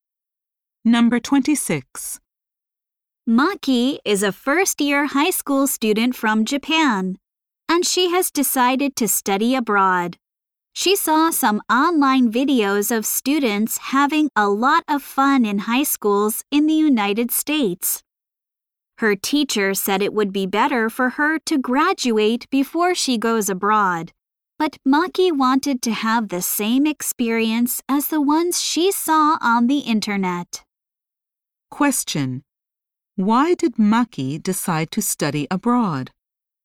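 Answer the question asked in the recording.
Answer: She wanted the same fun experience she saw in online videos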